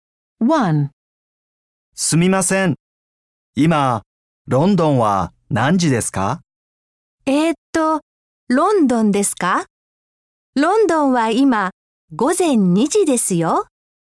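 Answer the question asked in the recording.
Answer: 午前2時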